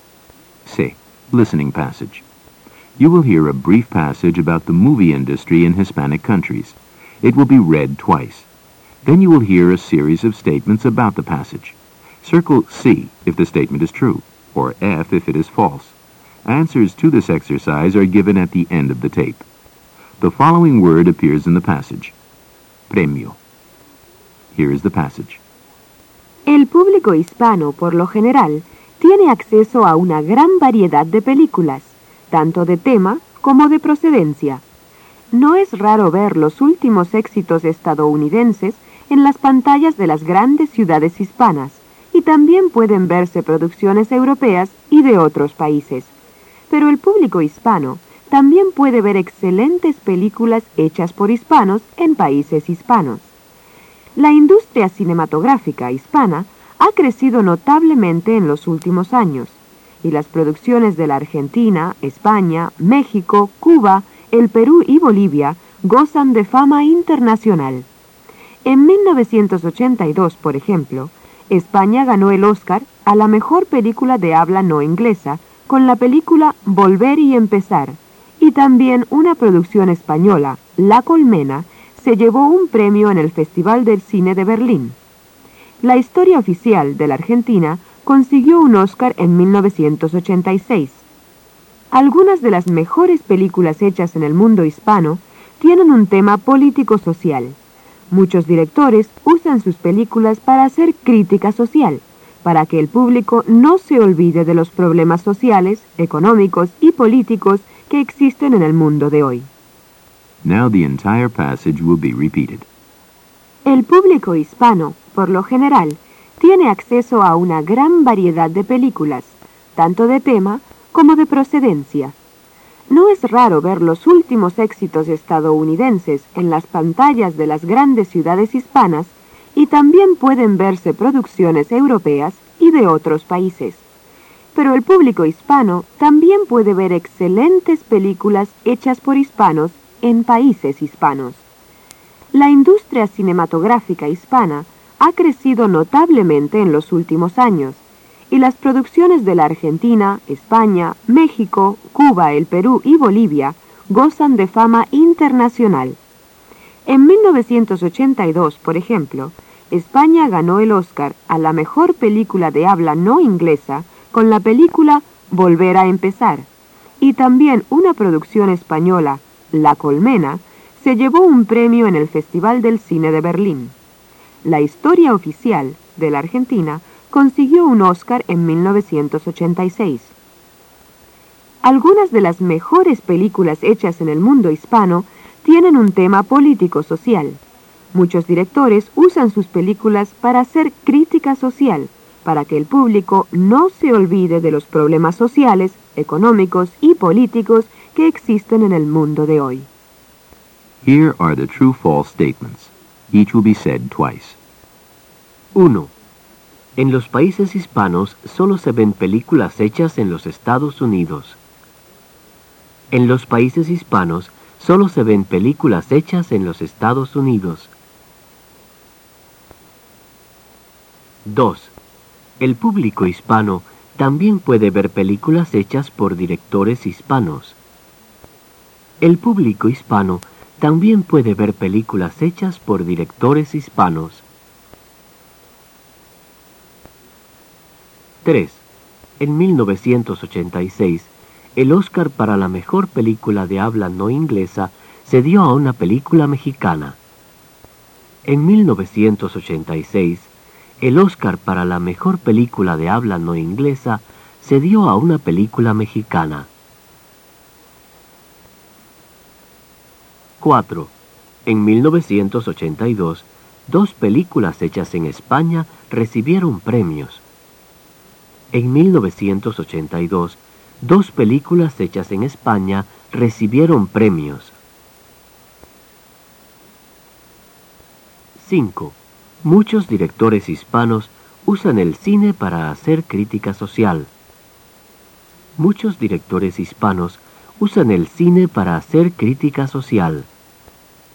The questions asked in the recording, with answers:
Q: En los países hispanos solo se ven películas hechas en los Estados Unidos.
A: 1. F.

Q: El público hispano también puede ver películas hechas por directores hispanos.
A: 2. C.

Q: En 1986, el Oscar para la mejor película de habla no inglesa se dio a una película mexicana.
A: 3. F.

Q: En 1982, dos películas hechas en España recibieron premios.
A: 4. C.